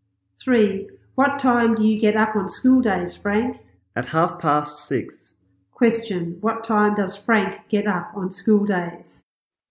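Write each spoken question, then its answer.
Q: What time does Frank get up on school days?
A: At 6:30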